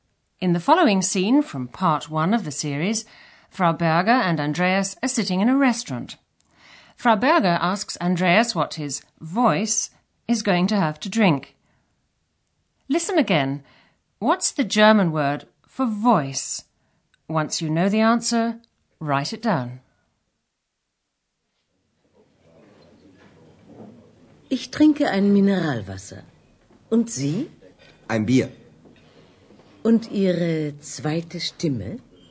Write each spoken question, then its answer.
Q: What's the German word for voice?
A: The answer is Stimme.